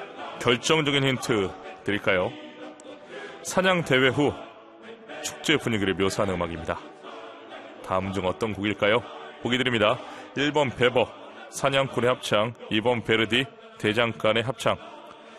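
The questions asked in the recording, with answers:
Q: 다음 중 어떤 곡일까요? 보기 드립니다. 1번 베버, 사냥꾼의 합창, 2번 베르디, 대장간의 합창.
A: 1: 베버, 사냥꾼의 합창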